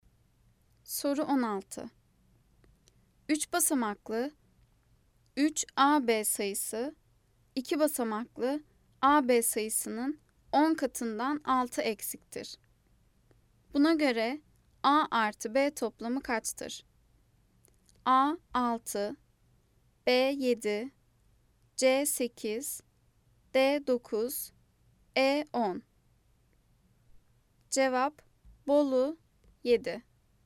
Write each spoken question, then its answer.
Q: Buna göre A artı B toplamı kaçtır?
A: Cevap Bolu 7.